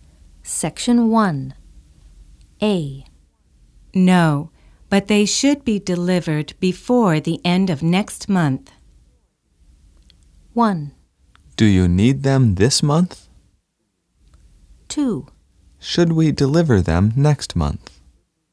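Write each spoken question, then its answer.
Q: No, but they should be delivered before the end of next month.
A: 1: Do you need them this month?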